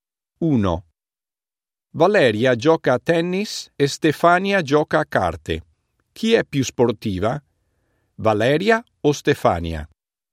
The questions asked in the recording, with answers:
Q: Chi è più sportiva? Valeria o Stefania?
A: Valeria è più sportiva di Stefania.